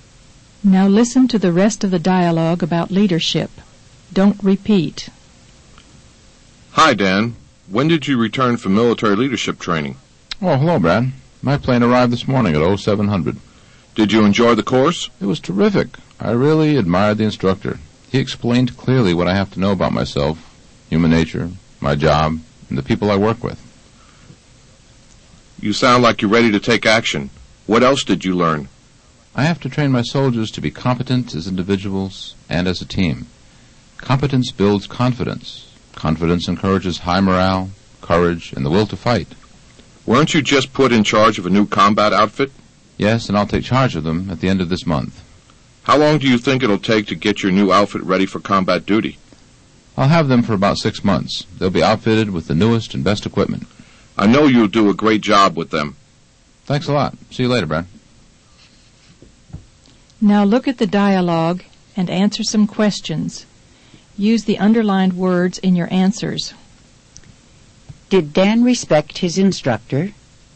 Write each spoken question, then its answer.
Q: Did Dan respect his instructor?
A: Yes, he really admired the instructor.